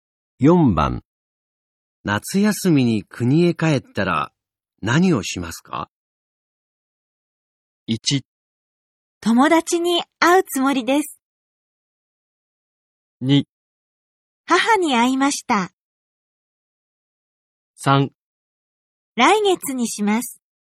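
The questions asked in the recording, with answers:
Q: 夏休みに国へ帰ったら何をしますか?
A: 1: 友達に会うつもりです。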